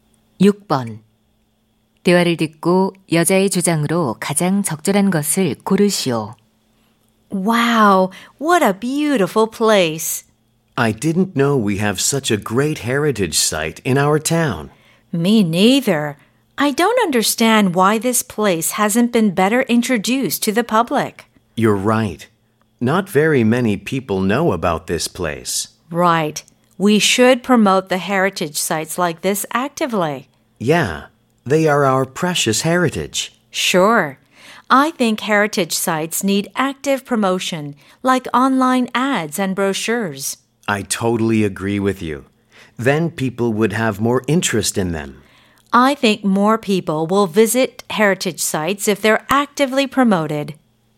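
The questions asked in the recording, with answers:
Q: 대화를 듣고 여자의 주장으로 가장 적절한 것을 고르시오.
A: 문화유산은 적극적으로 홍보해야 한다.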